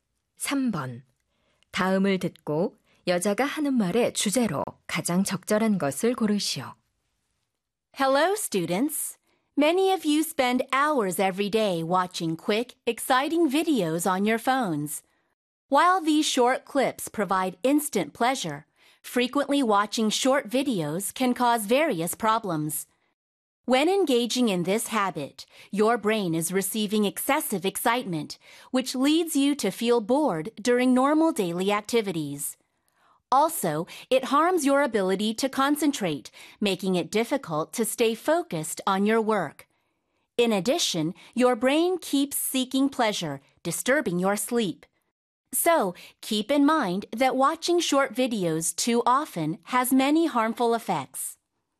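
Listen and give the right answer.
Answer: 짧은 영상을 자주 시청하는 것의 해로운 영향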